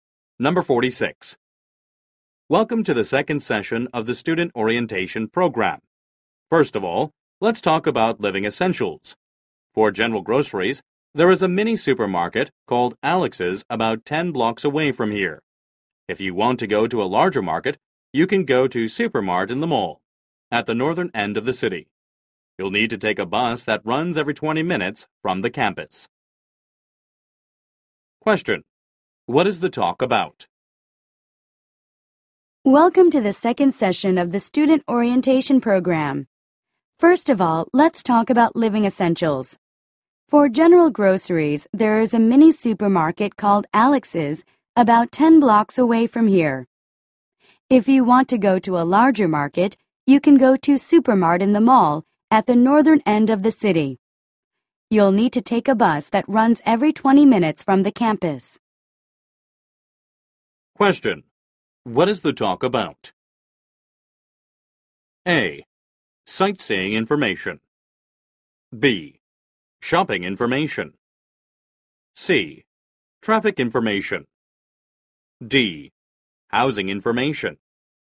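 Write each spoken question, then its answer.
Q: What is the talk about?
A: B: Shopping information.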